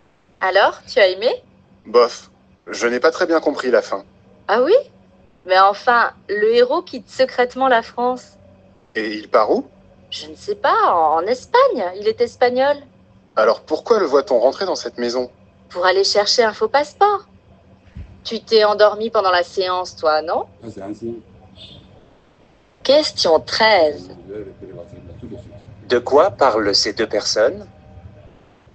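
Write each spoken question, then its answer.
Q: De quoi parlent ces deux personnes?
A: D'un film qu'ils ont vu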